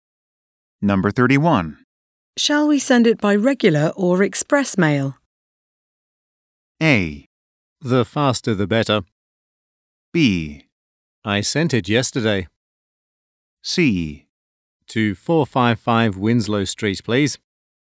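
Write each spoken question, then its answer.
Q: Shall we send it by regular or express mail?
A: A: The faster the better.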